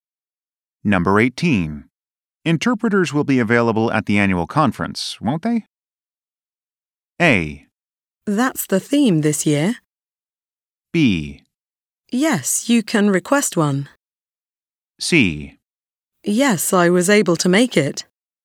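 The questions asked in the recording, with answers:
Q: Interpreters will be available at the annual conference, won't they?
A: B: Yes, you can request one.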